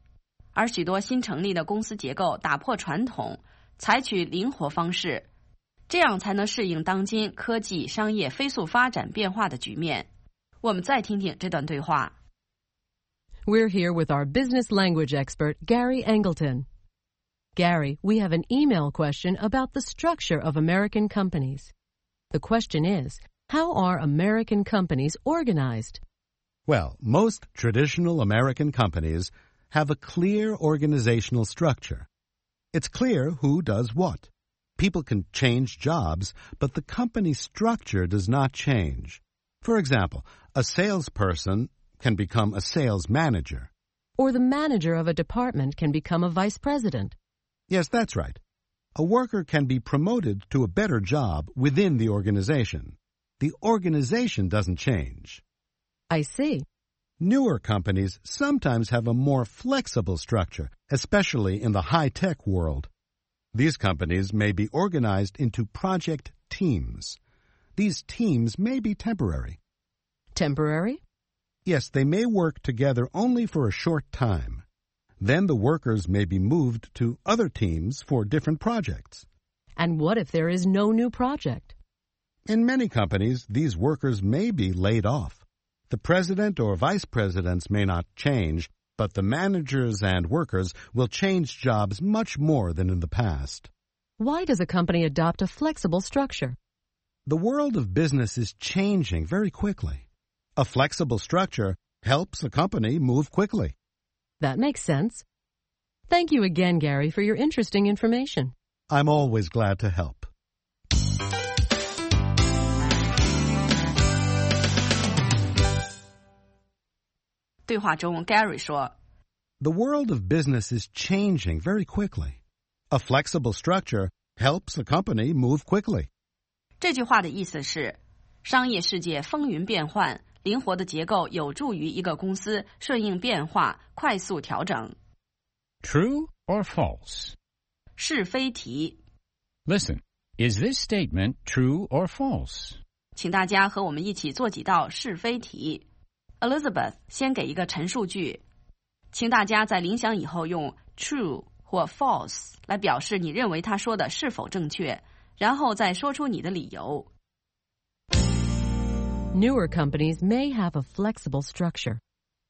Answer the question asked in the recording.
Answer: True. Newer companies, especially high-tech companies, often have a more flexible structure than traditional companies.